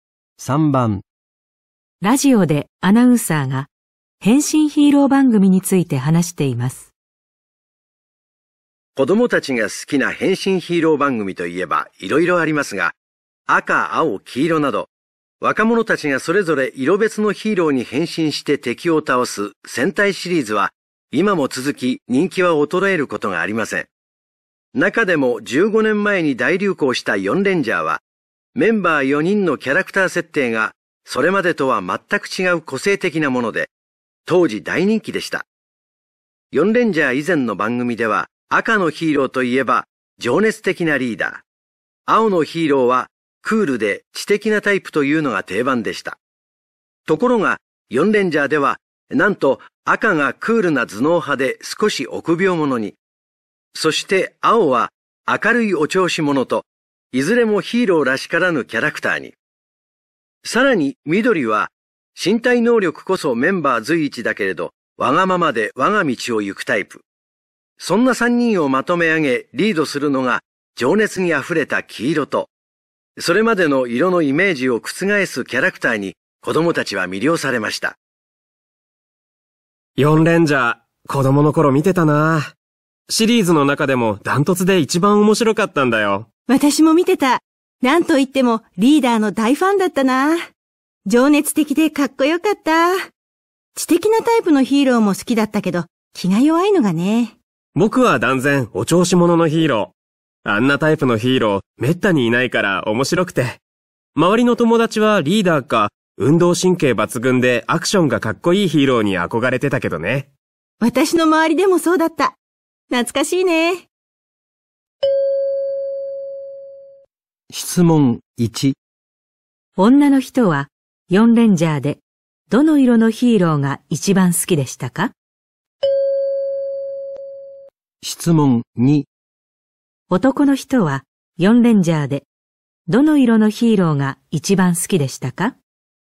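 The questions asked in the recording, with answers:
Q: 女の人は4レンジャーでどの色のヒーローが一番好きでしたか?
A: 黄色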